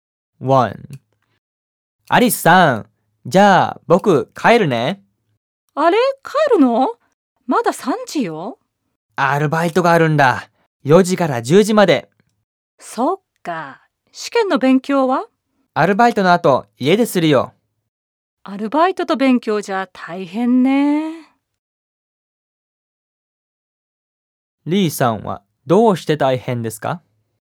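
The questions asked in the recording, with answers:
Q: リーさんはどうして大変ですか?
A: アルバイトをしながら勉強するから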